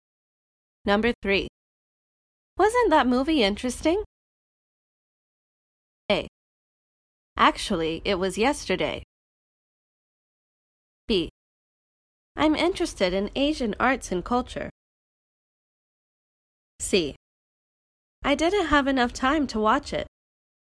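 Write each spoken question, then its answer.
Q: Wasn't that movie interesting?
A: C: I didn't have enough time to watch it.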